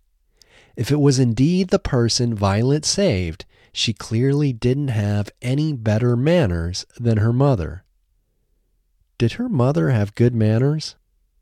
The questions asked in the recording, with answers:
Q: Did her mother have good manners?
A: No, her mother didn't have good manners.